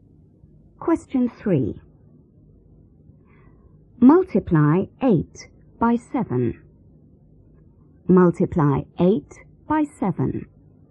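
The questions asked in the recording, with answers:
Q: Multiply 8 by 7.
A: 56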